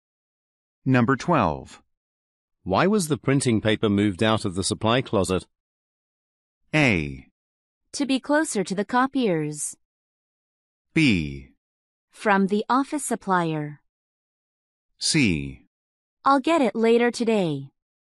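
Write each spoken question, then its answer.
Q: Why was the printing paper moved out of the supply closet?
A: A: To be closer to the copiers.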